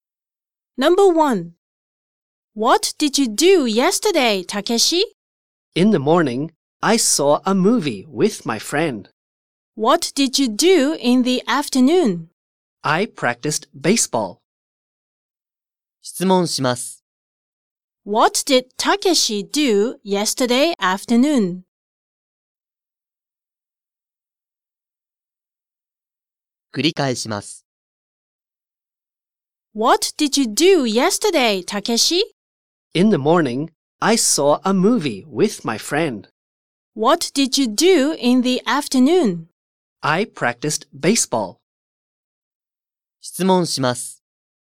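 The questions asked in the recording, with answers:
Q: What did Takeshi do yesterday afternoon?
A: He practiced baseball.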